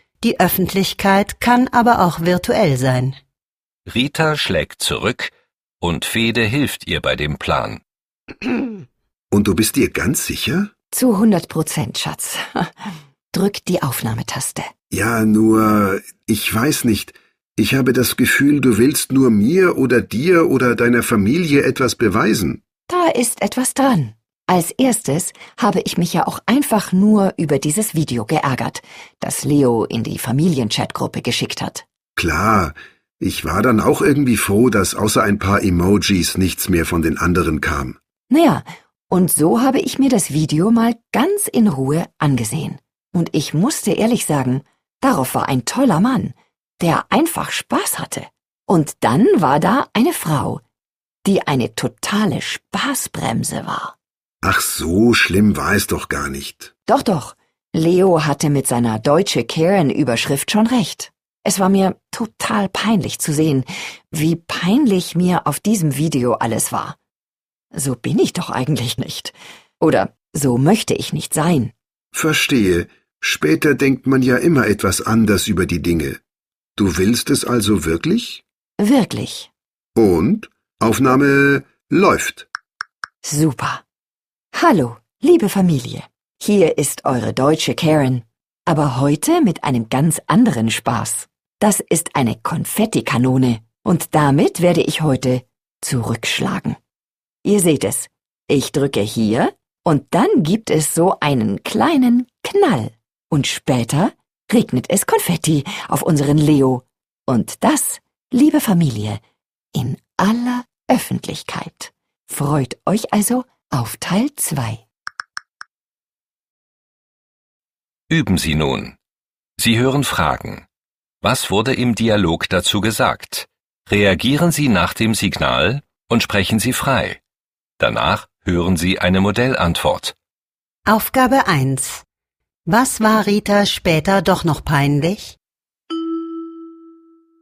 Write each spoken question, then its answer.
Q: Was war Rita später doch noch peinlich?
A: Rita war es peinlich, wie sie in dem Video reagiert hat.